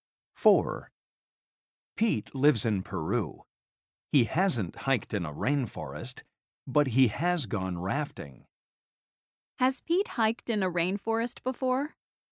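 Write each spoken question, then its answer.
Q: Has Pete hiked in a rainforest before?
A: No, he hasn't.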